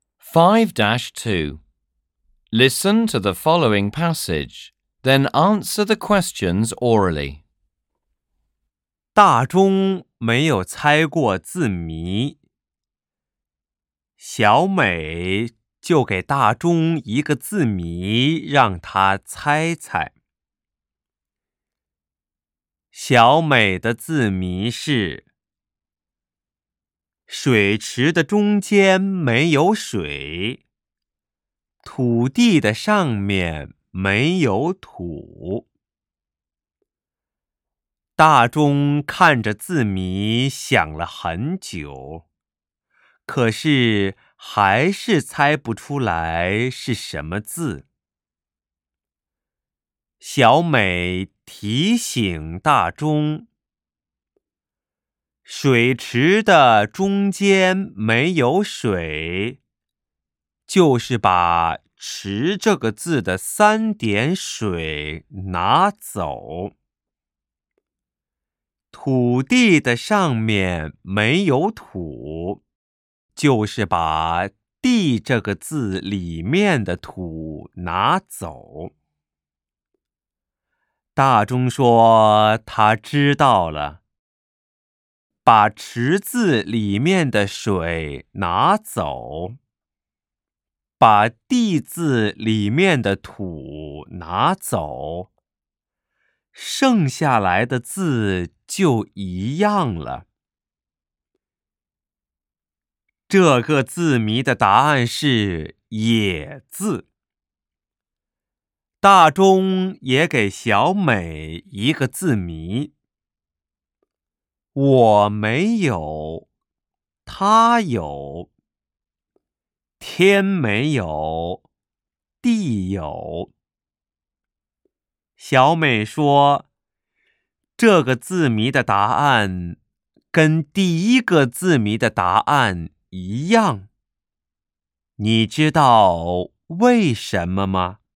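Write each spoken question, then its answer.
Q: 小美说,这个字谜的答案跟第一个字谜的答案一样。你知道为什么吗?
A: 因为答案也是"也"字:"他"字和"地"字里都有"也","我"字和"天"字里没有。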